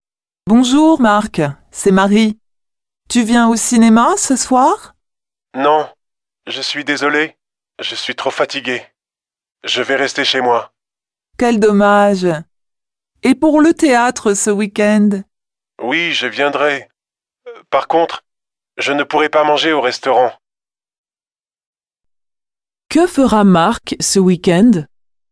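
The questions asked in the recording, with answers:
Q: Que fera Marc ce week-end?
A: Il ira au théâtre (mais ne mangera pas au restaurant).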